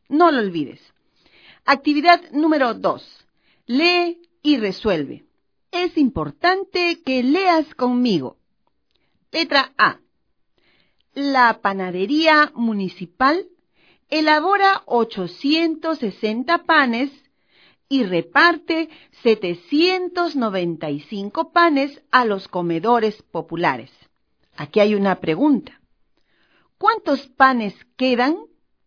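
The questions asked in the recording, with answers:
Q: ¿Cuántos panes quedan?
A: 65 panes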